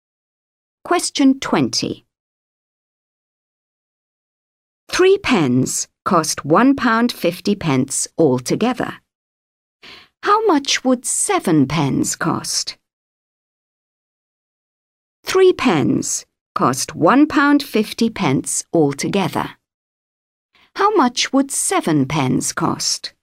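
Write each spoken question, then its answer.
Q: How much would seven pens cost?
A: £3.50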